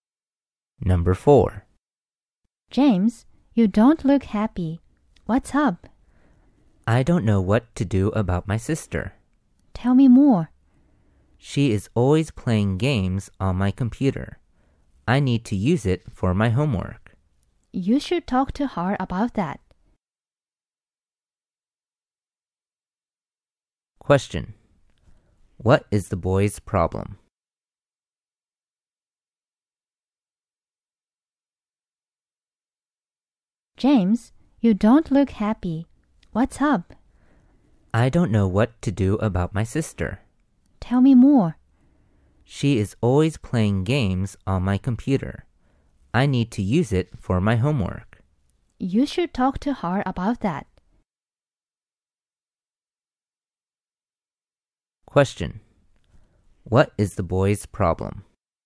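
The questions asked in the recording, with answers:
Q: What is the boy's problem?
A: His sister is always playing games on his computer, but he needs it for his homework.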